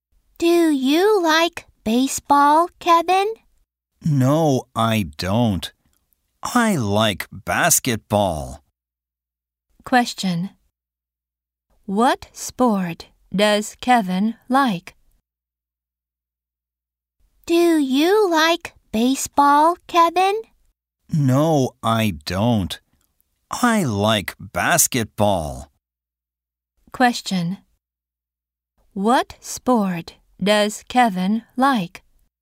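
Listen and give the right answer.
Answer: Basketball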